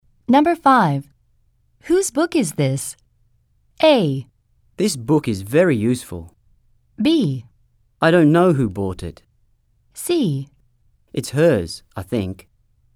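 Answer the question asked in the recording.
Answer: C: It's hers, I think.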